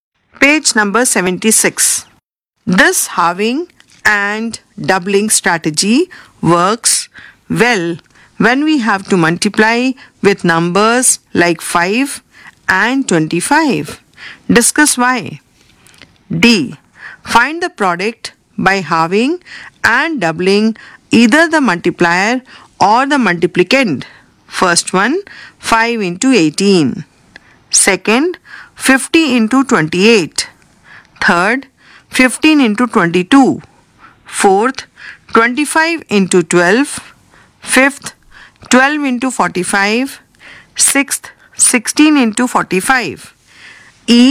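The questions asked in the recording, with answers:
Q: First one, 5 into 18.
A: 90

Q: Second, 50 into 28.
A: 1400

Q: Third, 15 into 22.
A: 330

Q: Fourth, 25 into 12.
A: 300

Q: Fifth, 12 into 45.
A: 540

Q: Sixth, 16 into 45.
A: 720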